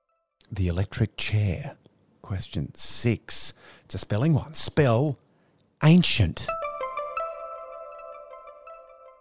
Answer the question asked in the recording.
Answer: A-N-C-I-E-N-T. Ancient.